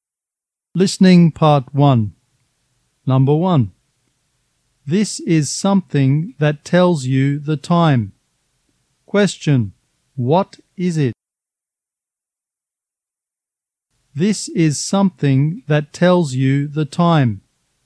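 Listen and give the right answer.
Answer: A clock or watch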